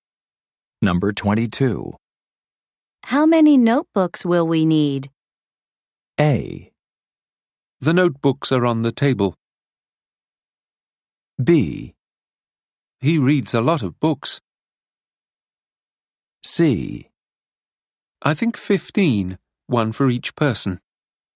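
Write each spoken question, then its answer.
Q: How many notebooks will we need?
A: C: I think 15, one for each person.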